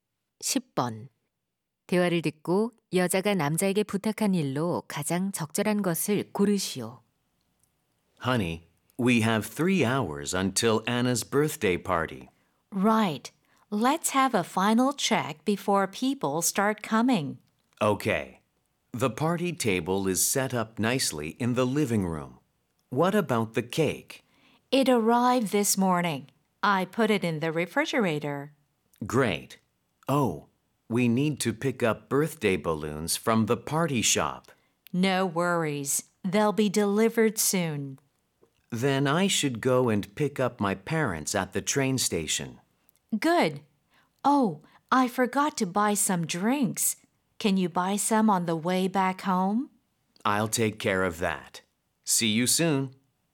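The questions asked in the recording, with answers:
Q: 대화를 듣고 여자가 남자에게 부탁한 일로 가장 적절한 것을 고르시오.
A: 음료 사 오기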